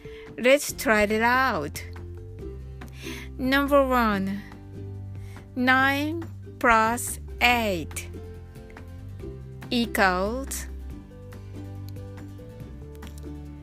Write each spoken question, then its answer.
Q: 9 plus 8 equals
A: the answer is 17